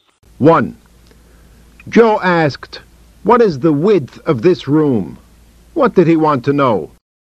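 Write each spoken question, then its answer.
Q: What did he want to know?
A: The width of the room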